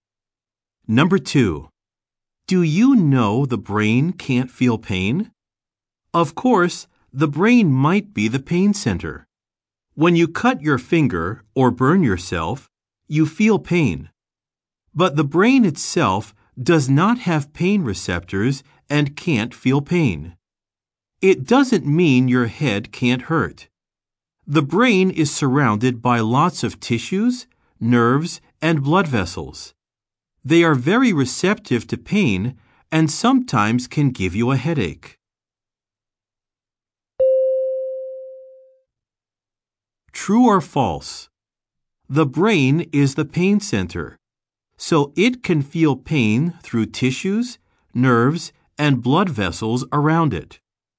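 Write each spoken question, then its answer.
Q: True or false? The brain is the pain center, so it can feel pain through tissues, nerves, and blood vessels around it.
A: False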